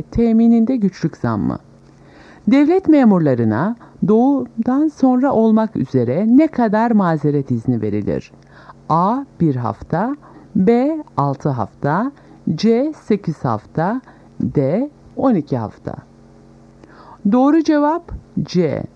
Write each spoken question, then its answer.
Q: Devlet memurlarına doğumdan sonra olmak üzere ne kadar mazeret izni verilir?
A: Doğru cevap C. 8 hafta.